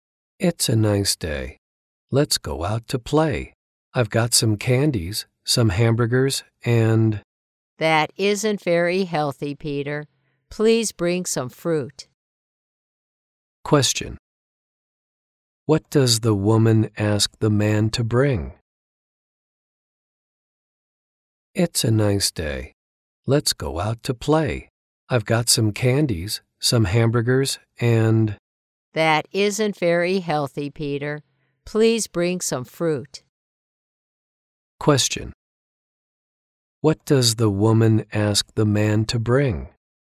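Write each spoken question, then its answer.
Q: What does the woman ask the man to bring?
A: Some fruit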